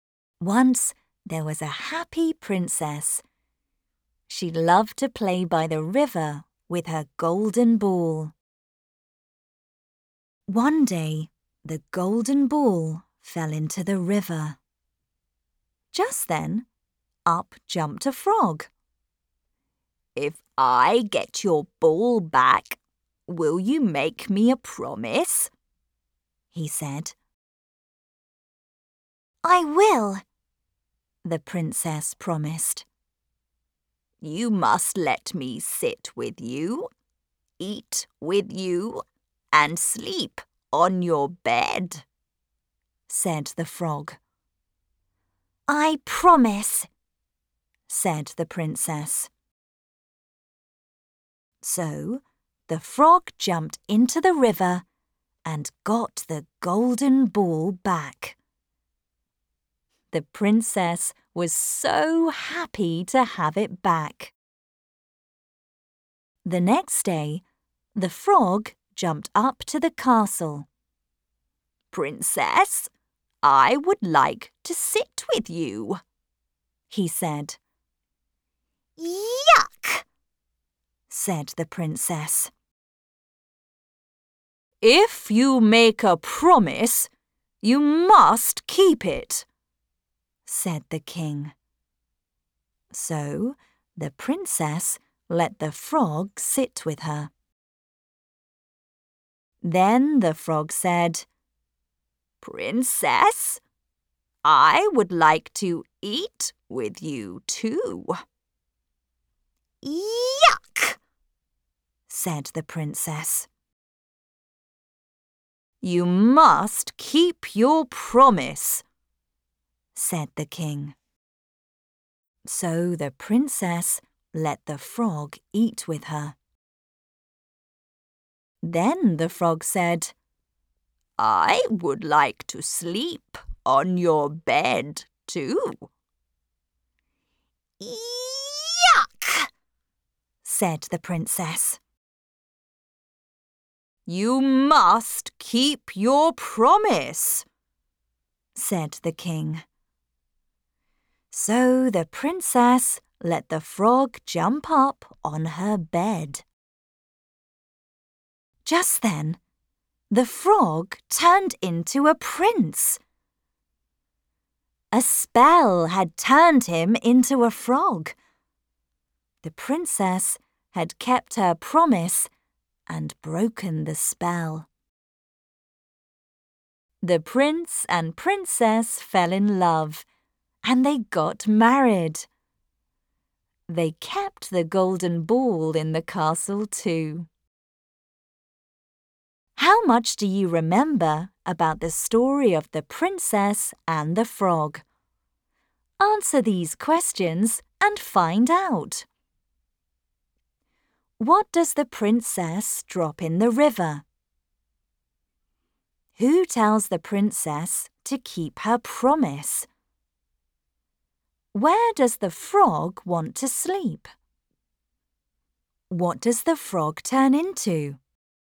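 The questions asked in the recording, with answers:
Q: What does the princess drop in the river?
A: her golden ball

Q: Who tells the princess to keep her promise?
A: the king

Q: Where does the frog want to sleep?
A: on the princess's bed

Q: What does the frog turn into?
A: a prince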